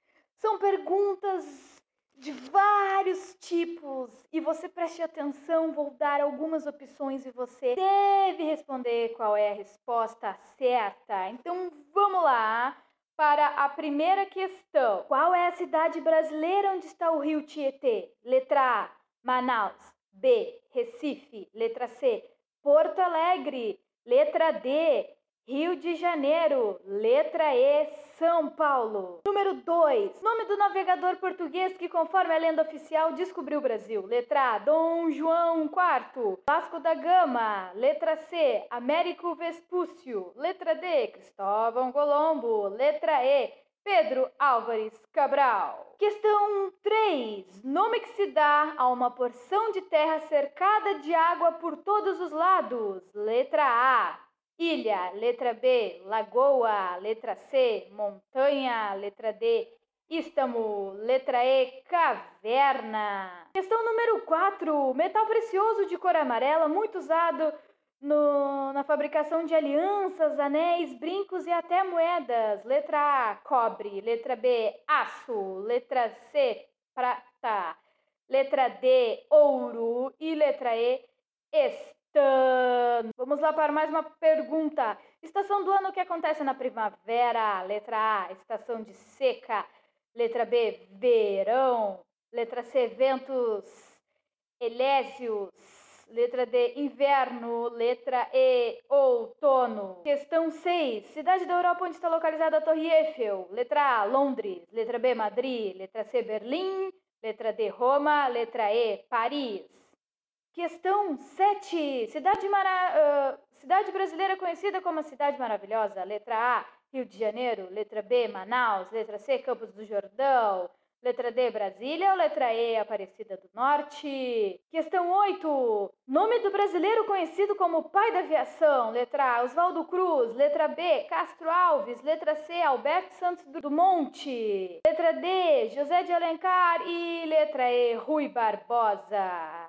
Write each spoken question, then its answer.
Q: Qual é a cidade brasileira onde está o rio Tietê?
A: Se sua resposta foi São Paulo, certa a resposta.

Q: Nome do navegador português que, conforme a lenda oficial, descobriu o Brasil.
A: Se sua resposta foi Pedro Álvares Cabral, Parabéns!

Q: Nome que se dá a uma porção de terra cercada de água por todos os lados.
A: Se sua resposta foi ilha, parabéns!

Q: Metal precioso de cor amarela, muito usado no, na fabricação de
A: Se sua resposta foi ouro, parabéns!

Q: Cidade da Europa onde está localizada a Torre Eiffel.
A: Se você falou que era Paris, parabéns, você é um gênio.

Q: Cidade, mara... uh, cidade brasileira conhecida como a Cidade Maravilhosa.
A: Se você colocou Rio de Janeiro, parabéns.

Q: Nome do brasileiro conhecido como pai da aviação.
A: Se você botou Alberto Santos do Monte, você acertou.